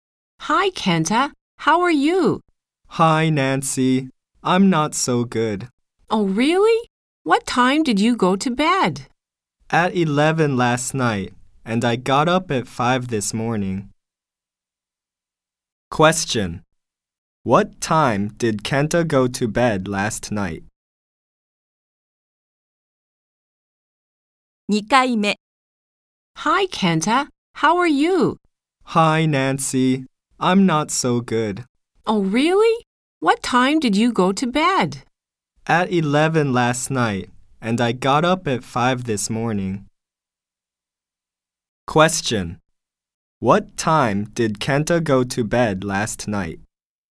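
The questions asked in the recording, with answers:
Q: What time did Kenta go to bed last night?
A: At 11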